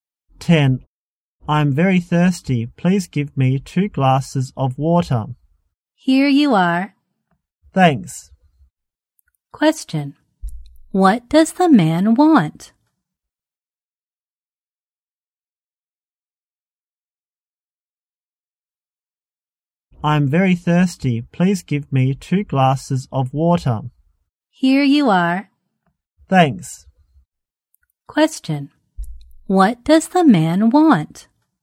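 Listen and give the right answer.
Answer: Two glasses of water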